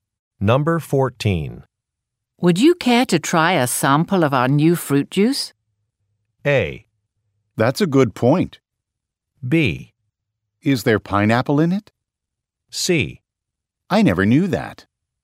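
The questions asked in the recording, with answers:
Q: Would you care to try a sample of our new fruit juice?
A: B: Is there pineapple in it?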